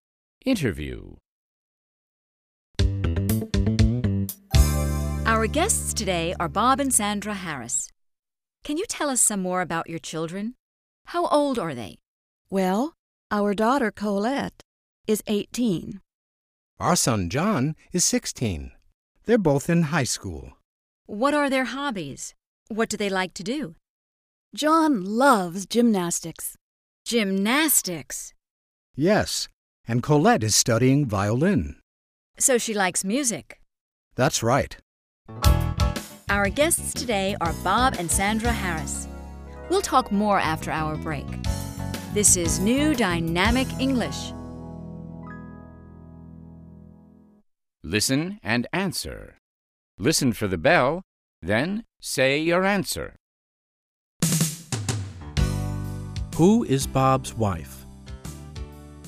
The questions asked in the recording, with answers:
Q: Who is Bob's wife?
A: Sandra is Bob's wife.